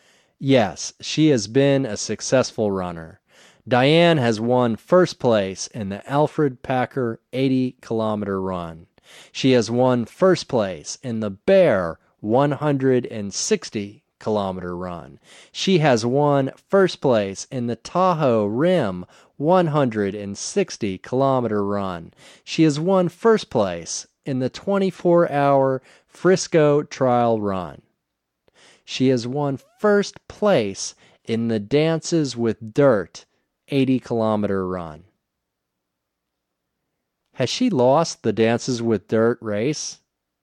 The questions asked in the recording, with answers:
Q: Has she lost the Dances with Dirt race?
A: No, she hasn't lost the Dances with Dirt race.